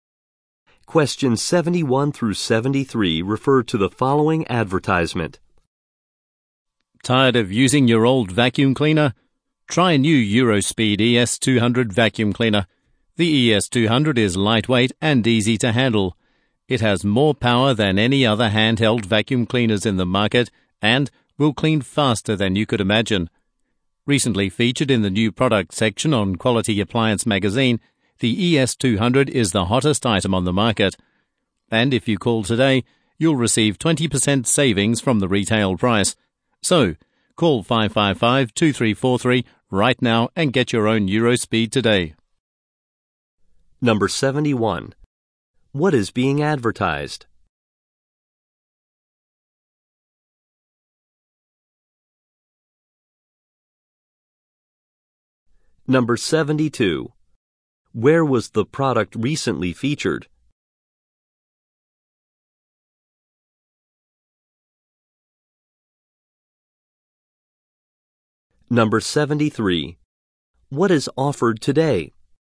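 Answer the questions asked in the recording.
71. A vacuum cleaner
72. In Quality Appliance magazine
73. 20% off the retail price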